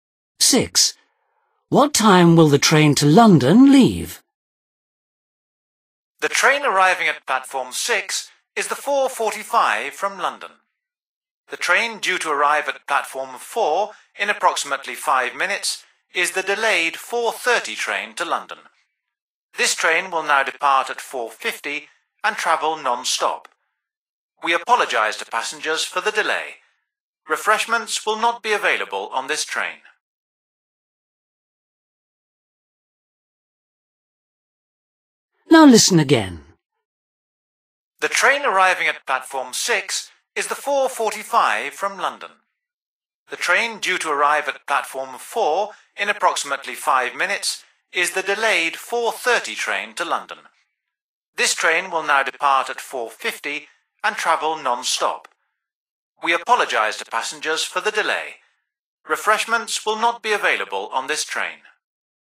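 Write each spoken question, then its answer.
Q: What time will the train to London leave?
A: 4:50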